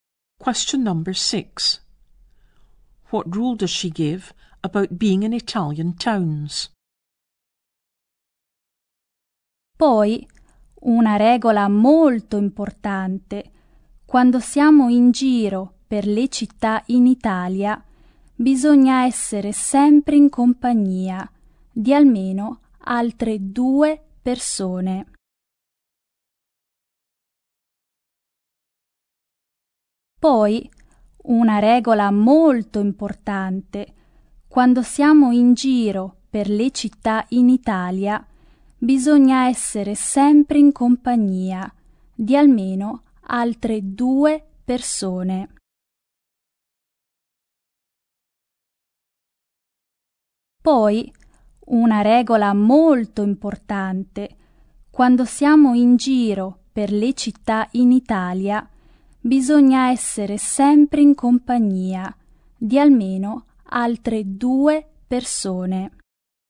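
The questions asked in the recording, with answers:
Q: What rule does she give about being in Italian towns?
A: You must always be with at least two other people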